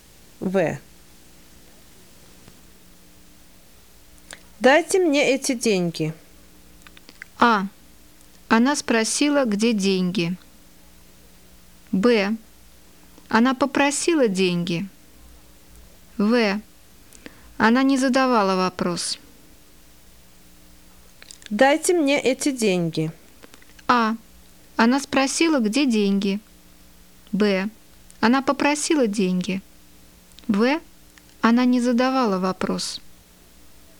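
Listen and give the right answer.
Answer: Б: Она попросила деньги.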